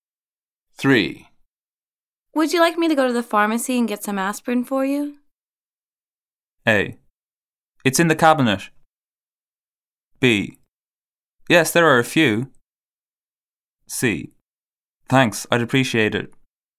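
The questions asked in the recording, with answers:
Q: Would you like me to go to the pharmacy and get some aspirin for you?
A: C: Thanks, I'd appreciate it.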